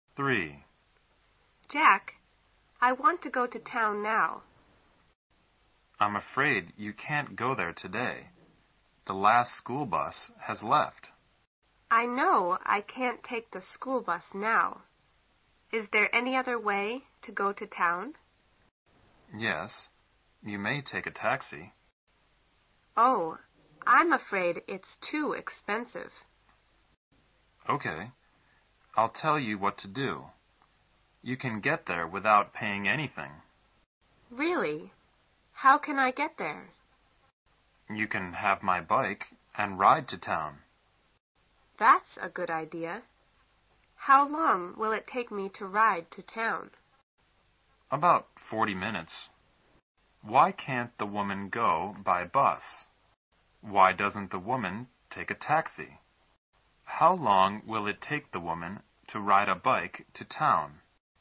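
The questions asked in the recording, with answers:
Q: Why can't the woman go by bus?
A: The last school bus has left

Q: Why doesn't the woman take a taxi?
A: It's too expensive

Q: How long will it take the woman to ride a bike to town?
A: About 40 minutes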